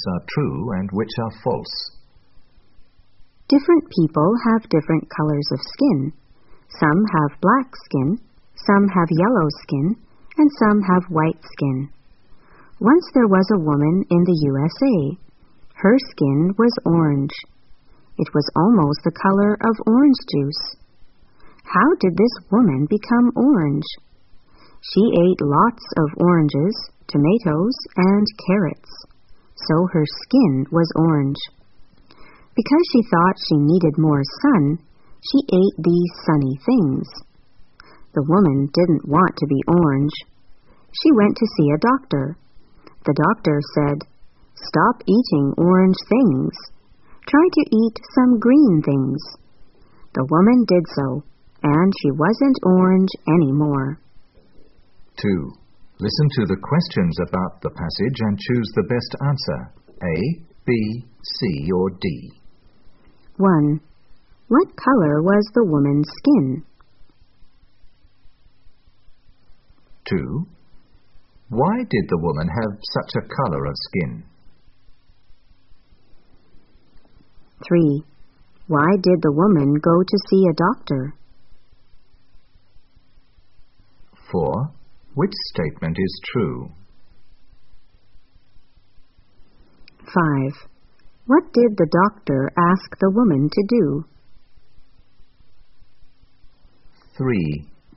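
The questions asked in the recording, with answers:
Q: What color was the woman's skin?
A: Orange

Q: Why did the woman have such a color of skin?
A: She ate lots of oranges, tomatoes, and carrots.

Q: Why did the woman go to see a doctor?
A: She didn't want to be orange.

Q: What did the doctor ask the woman to do?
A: Stop eating orange things and eat some green things.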